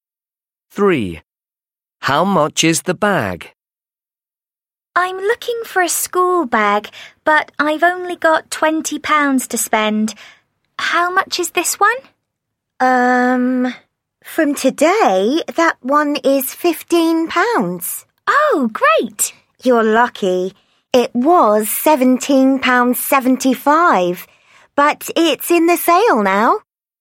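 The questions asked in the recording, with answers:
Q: How much is the bag?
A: £15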